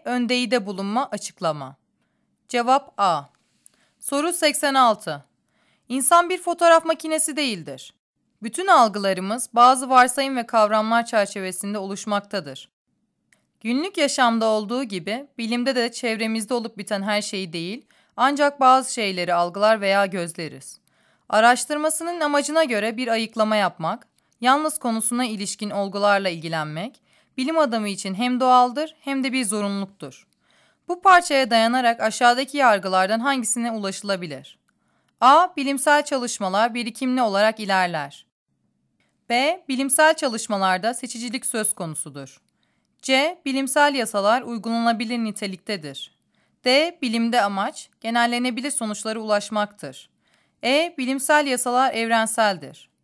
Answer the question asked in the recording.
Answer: Cevap B.